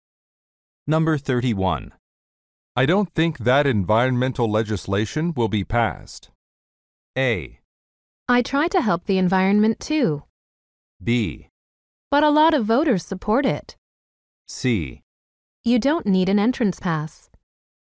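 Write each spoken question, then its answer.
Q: I don't think that environmental legislation will be passed.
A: B: But a lot of voters support it.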